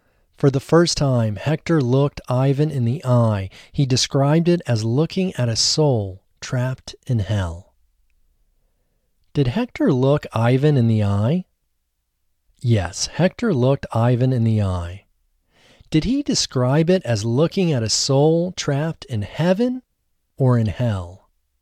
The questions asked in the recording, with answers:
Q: Did he describe it as looking at a soul trapped in heaven or in hell?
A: He described it as looking at a soul trapped in hell.